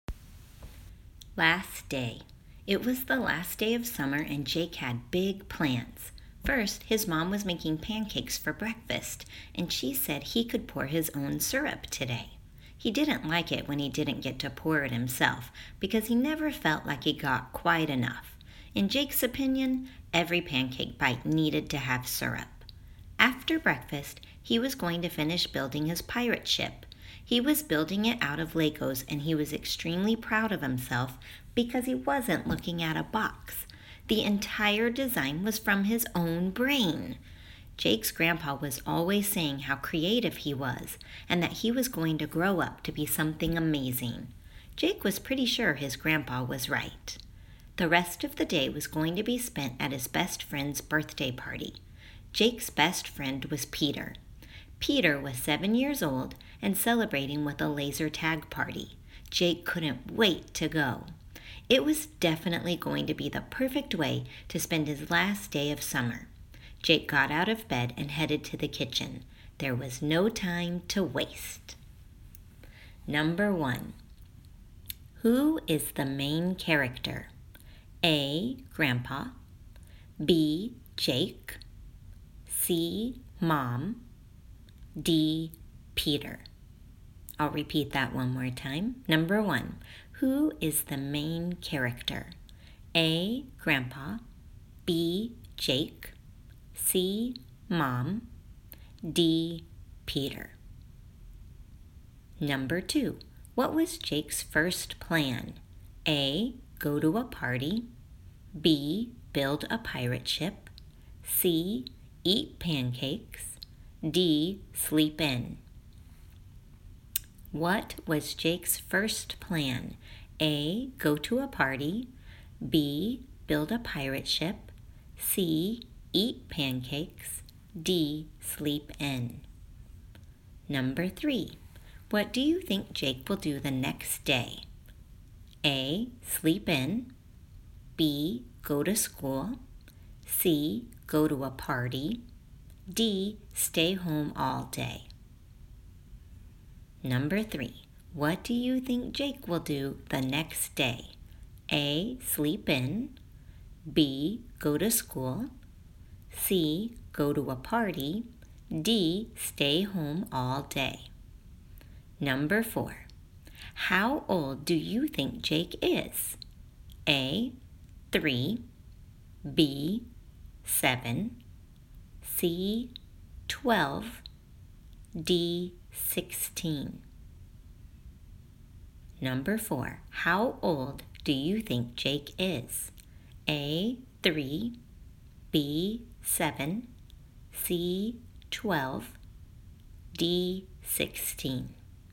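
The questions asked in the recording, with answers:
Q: Who is the main character?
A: B: Jake

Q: What was Jake's first plan?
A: C: Eat pancakes

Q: What do you think Jake will do the next day?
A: B: Go to school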